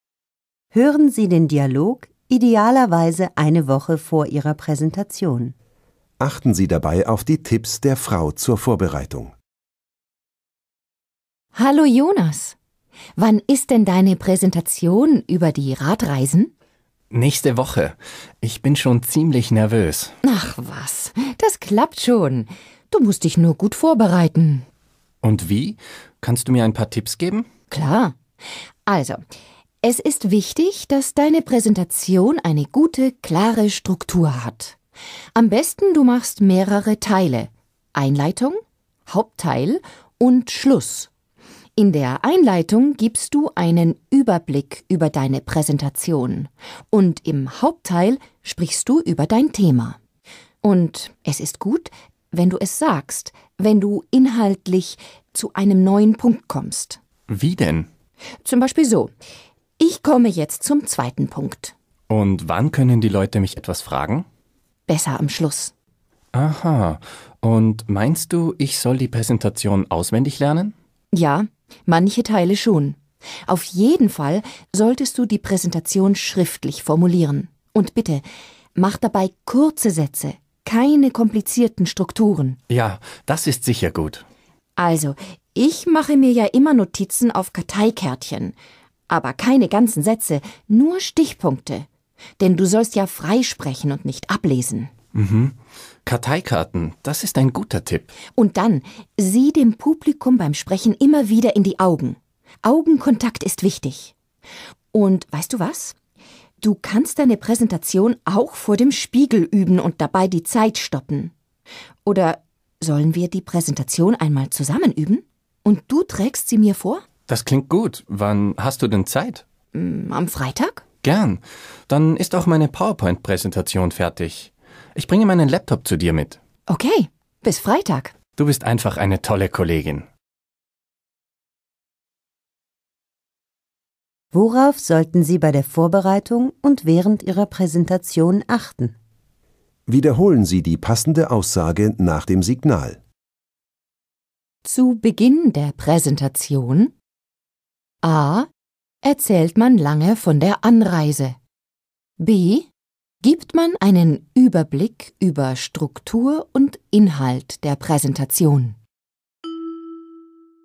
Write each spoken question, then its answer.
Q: Zu Beginn der Präsentation: A.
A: B. Zu Beginn der Präsentation gibt man einen Überblick über Struktur und Inhalt der Präsentation.